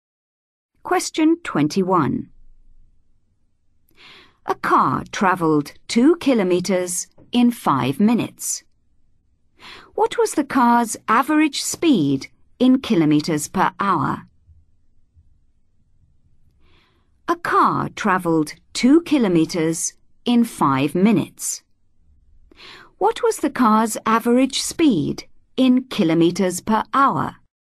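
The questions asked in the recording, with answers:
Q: What was the car's average speed in kilometres per hour?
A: 24 km/h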